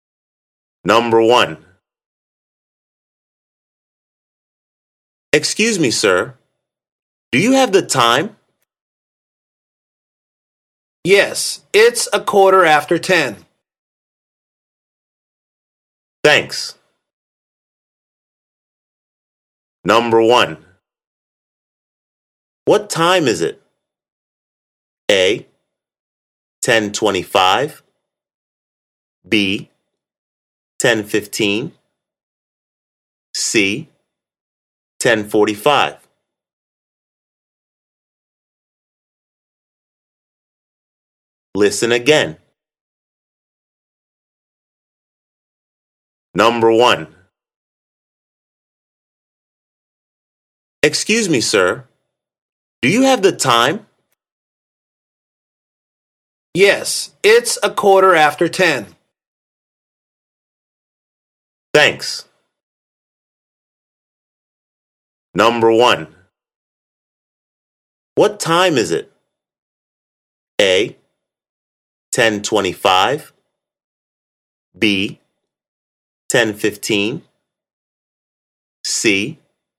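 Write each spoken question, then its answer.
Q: What time is it?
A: B: 10:15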